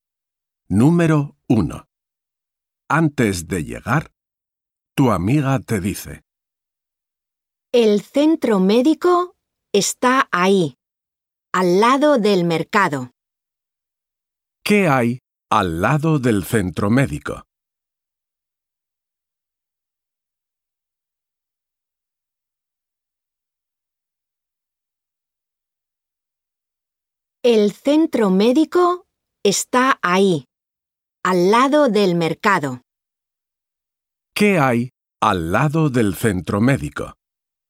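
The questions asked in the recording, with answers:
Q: ¿Qué hay al lado del centro médico?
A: el mercado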